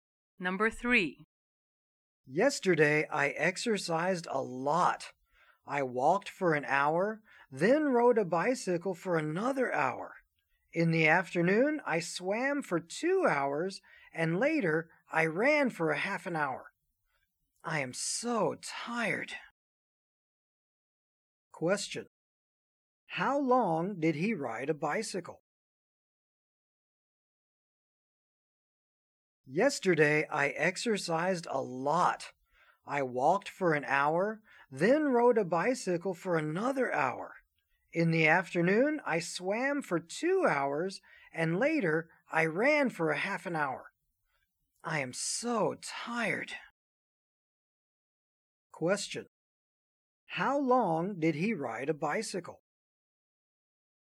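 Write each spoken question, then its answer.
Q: How long did he ride a bicycle?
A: For an hour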